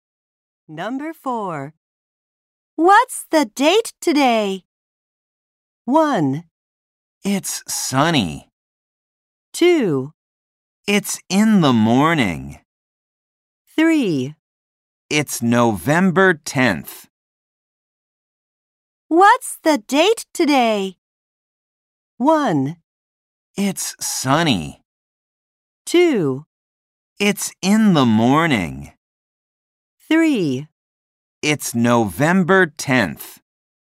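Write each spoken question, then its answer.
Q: What's the date today?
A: 3: It's November 10th.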